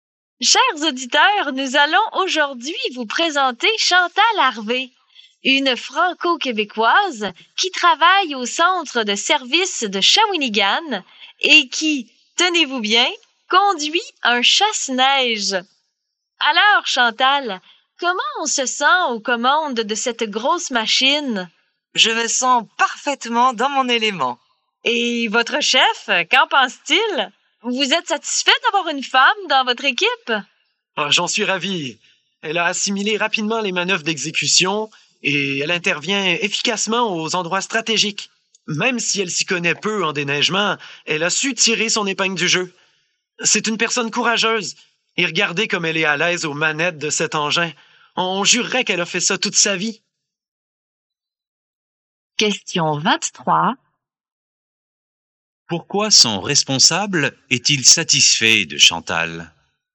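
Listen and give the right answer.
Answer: Elle a appris vite les manœuvres et intervient efficacement aux endroits stratégiques.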